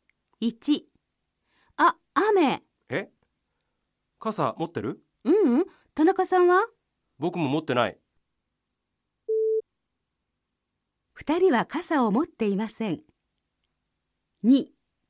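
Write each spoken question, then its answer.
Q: 2人は傘を持っていません。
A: ○(正しい)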